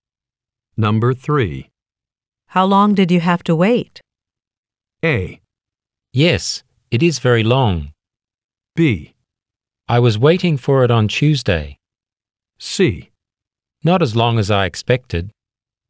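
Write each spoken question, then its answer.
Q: How long did you have to wait?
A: C: Not as long as I expected.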